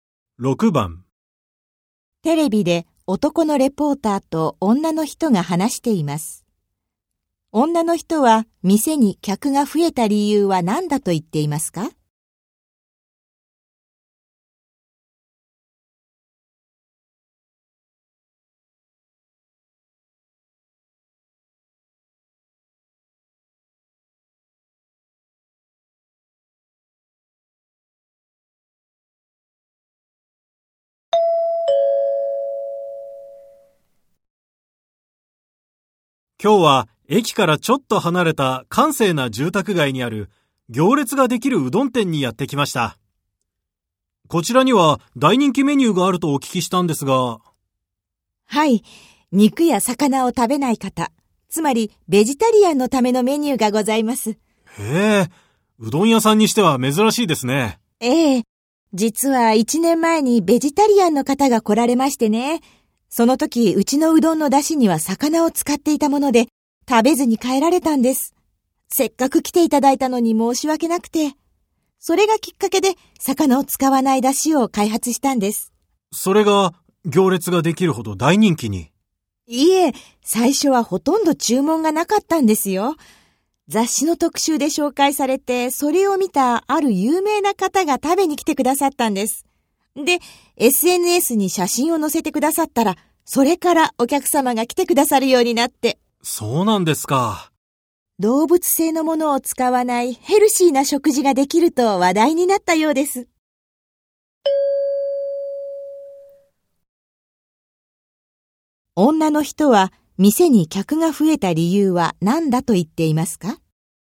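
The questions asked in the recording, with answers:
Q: 女の人は、店に客が増えた理由は何だと言っていますか?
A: 有名な人がSNSに店の写真を載せたから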